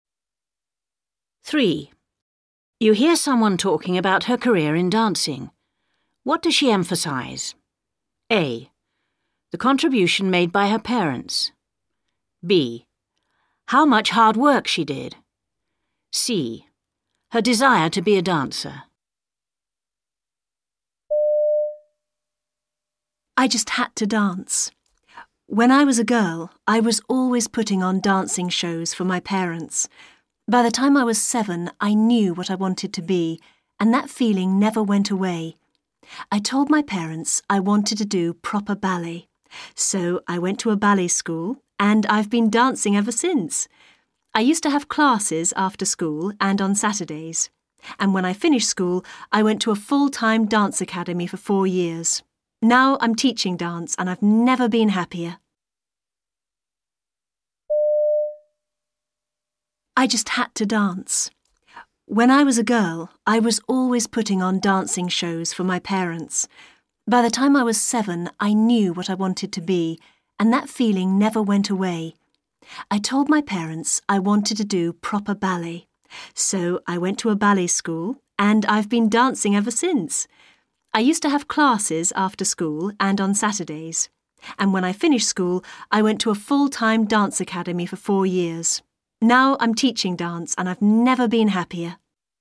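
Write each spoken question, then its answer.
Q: What does she emphasize?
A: C: Her desire to be a dancer.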